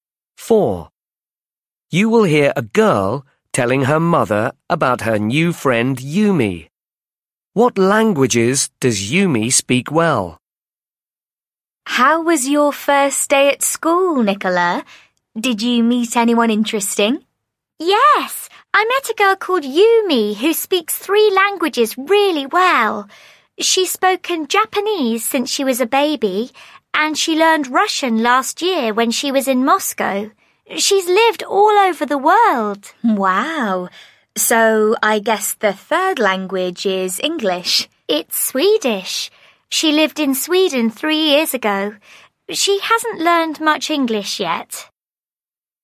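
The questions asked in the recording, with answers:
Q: What languages does Yumi speak well?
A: Japanese, Russian and Swedish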